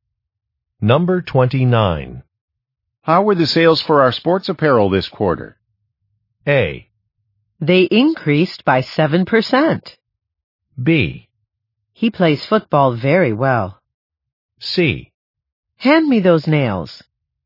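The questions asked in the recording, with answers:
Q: How were the sales for our sports apparel this quarter?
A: A: They increased by 7%.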